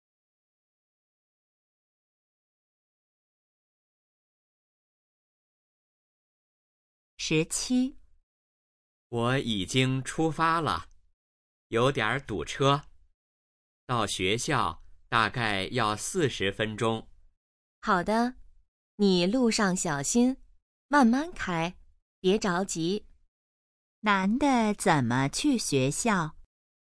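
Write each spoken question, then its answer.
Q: 男的怎么去学校?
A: 开车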